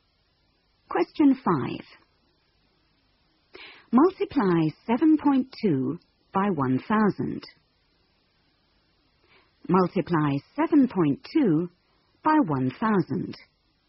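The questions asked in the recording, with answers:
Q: Multiply 7.2 by 1,000.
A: 7200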